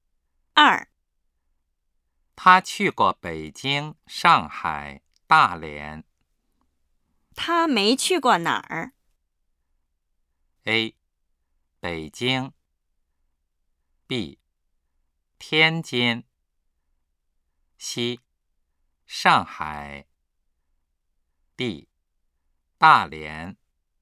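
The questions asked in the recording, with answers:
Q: 他没去过哪儿?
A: B: 天津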